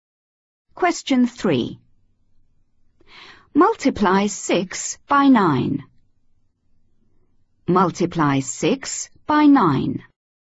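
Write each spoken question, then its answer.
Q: Multiply 6 by 9.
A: 54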